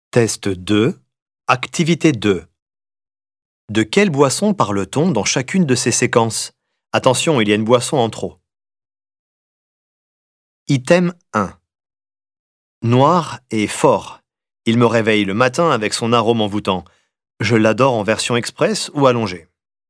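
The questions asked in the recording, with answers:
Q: De quelle boisson parle-t-on dans chacune de ces séquences?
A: le café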